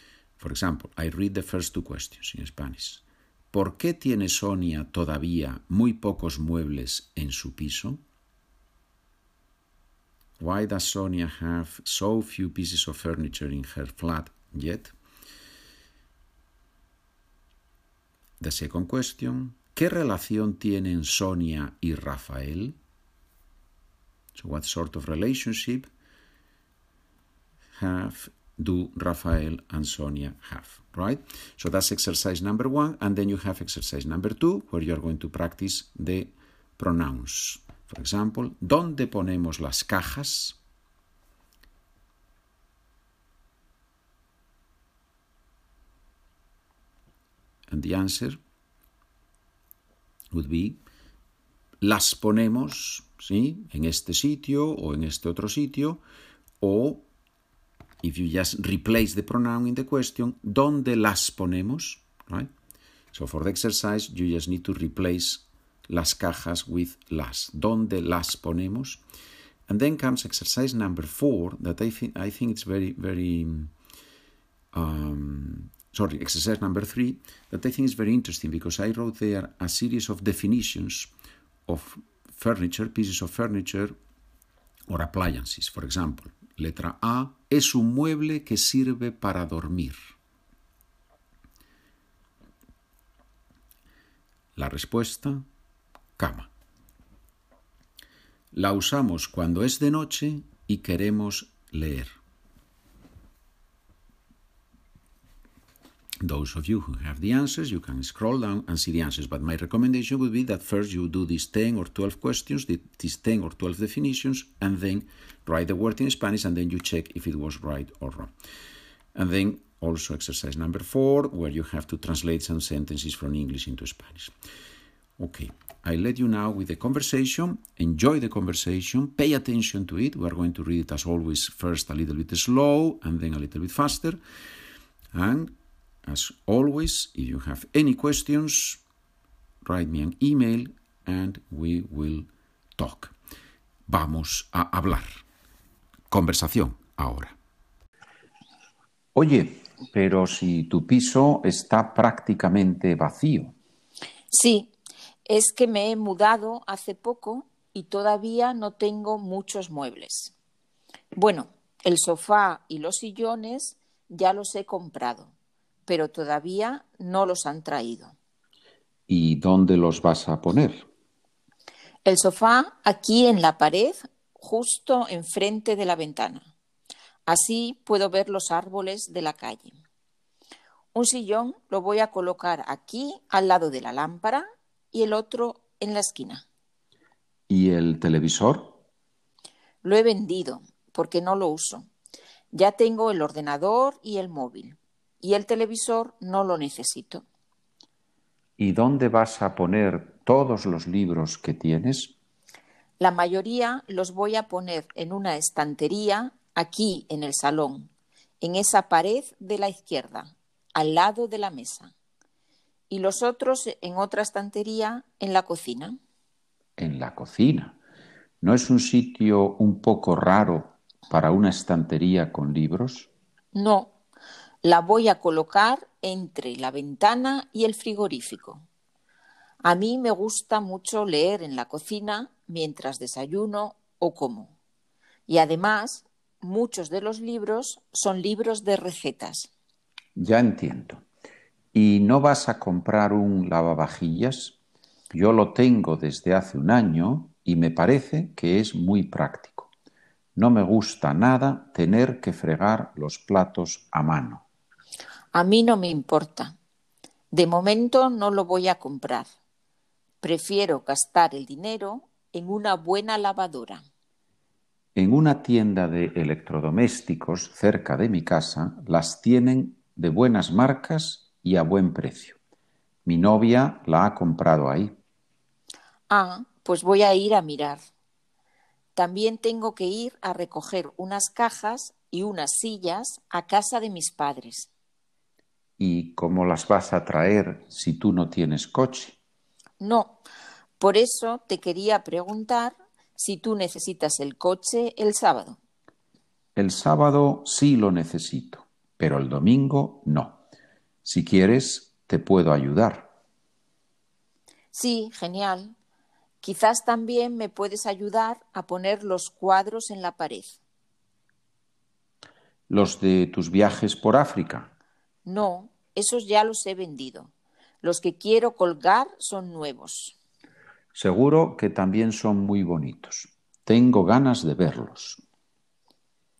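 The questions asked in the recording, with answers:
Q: ¿Por qué tiene Sonia todavía muy pocos muebles en su piso?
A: Porque se ha mudado hace poco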